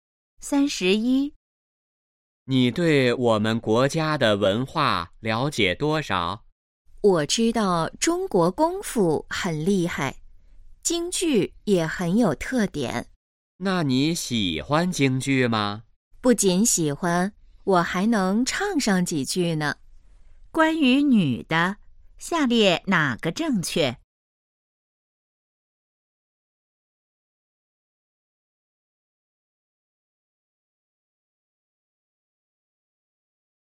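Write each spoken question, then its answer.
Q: 下列哪个正确?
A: 女的喜欢京剧,还会唱几句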